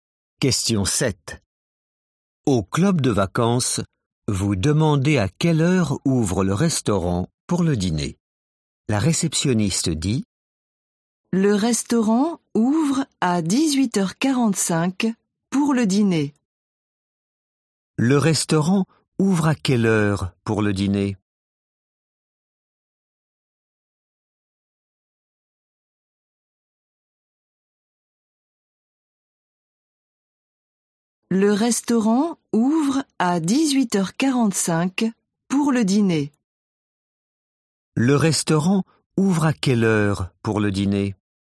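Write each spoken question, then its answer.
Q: Le restaurant ouvre à quelle heure pour le dîner ?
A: 18h45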